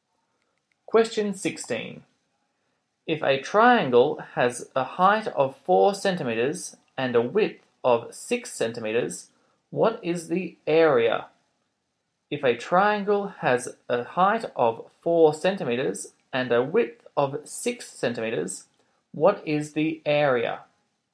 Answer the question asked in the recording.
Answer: The area is 12.